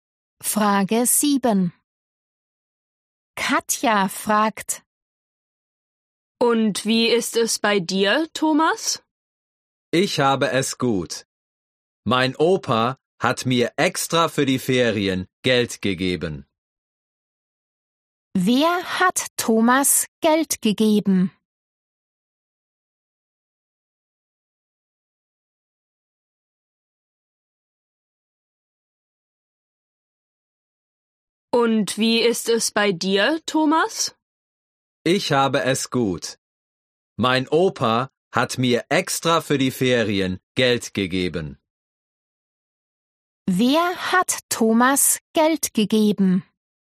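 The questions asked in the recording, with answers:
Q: Wer hat Thomas Geld gegeben?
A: Sein Opa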